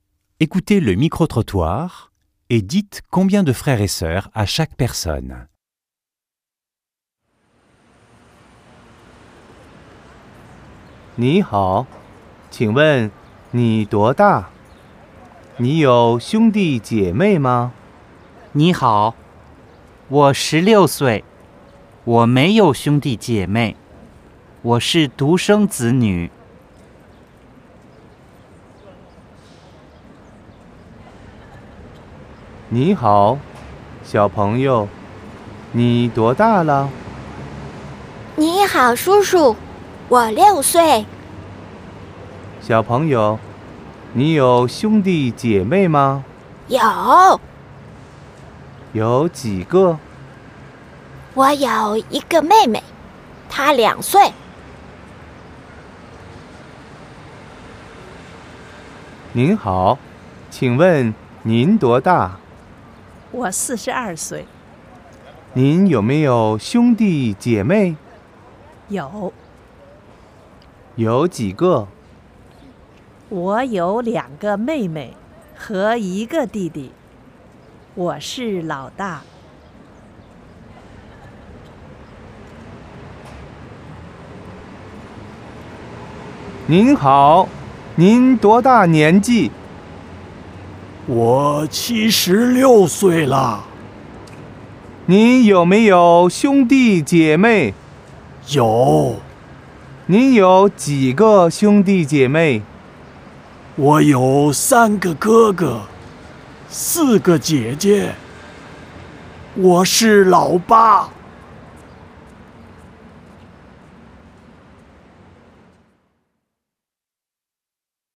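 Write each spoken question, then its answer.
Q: Écoutez le micro-trottoir et dites combien de frères et sœurs à chaque personne.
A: Personne 1 : 0 ; personne 2 : 1 (une petite sœur) ; personne 3 : 3 (deux petites sœurs et un petit frère) ; personne 4 : 7 (trois grands frères et quatre grandes sœurs)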